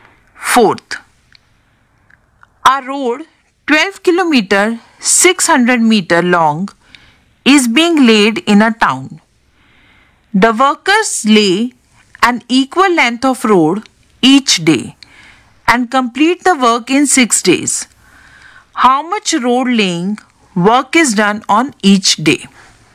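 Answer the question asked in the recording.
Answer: 2 km 100 meter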